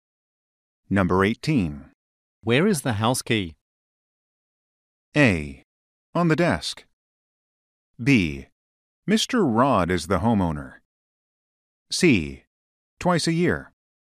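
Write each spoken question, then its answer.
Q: Where is the house key?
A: A: On the desk.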